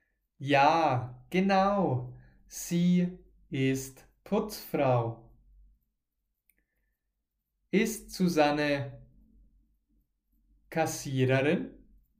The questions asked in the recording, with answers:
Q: Ist Susanne Kassiererin?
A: Nein, Susanne ist keine Kassiererin.